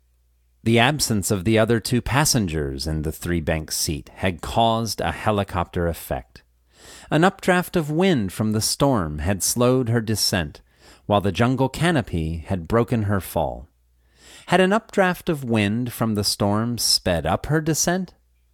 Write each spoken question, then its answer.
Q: Had an updraft of wind from the storm sped up her descent?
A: No, an updraft of wind from the storm had slowed her descent.